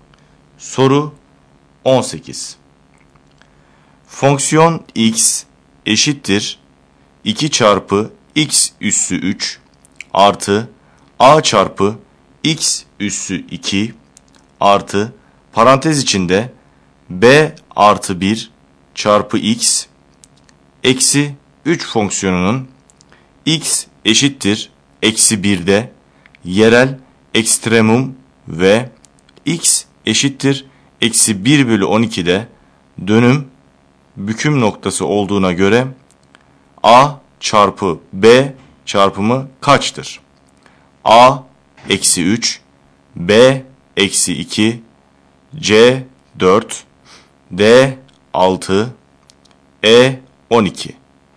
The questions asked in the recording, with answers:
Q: Fonksiyon x eşittir 2 çarpı x üssü 3 artı a çarpı x üssü 2 artı parantez içinde b artı 1 çarpı x eksi 3 fonksiyonunun x eşittir eksi 1'de yerel ekstremum ve x eşittir eksi 1 bölü 12'de dönüm büküm noktası olduğuna göre A çarpı B çarpımı kaçtır?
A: Doğru yanıt A şıkkı.